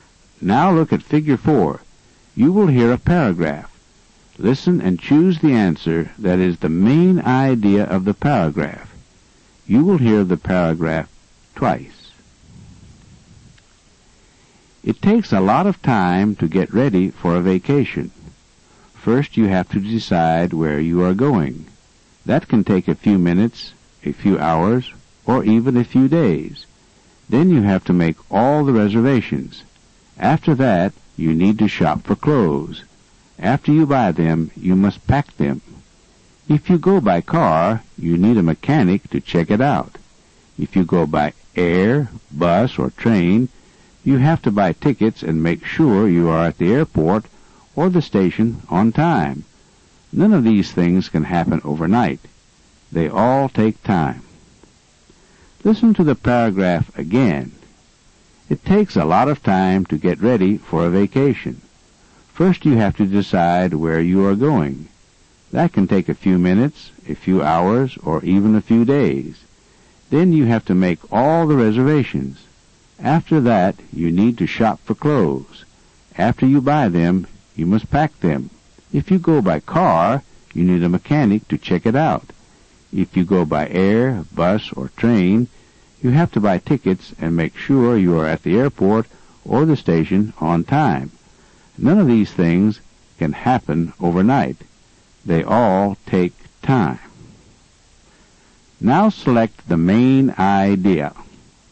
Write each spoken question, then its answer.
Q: Now select the main idea.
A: It takes time to get ready for a vacation.